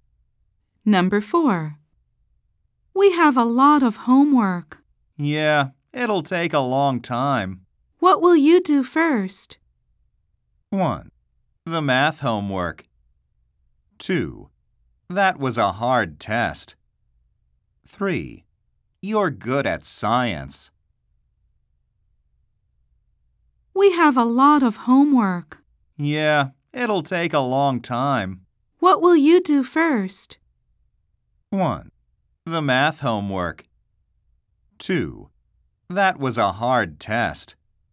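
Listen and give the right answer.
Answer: 1: The math homework.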